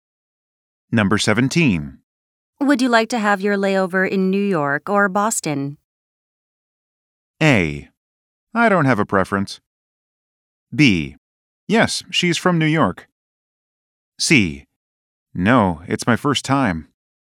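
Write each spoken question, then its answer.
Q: Would you like to have your layover in New York or Boston?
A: A: I don't have a preference.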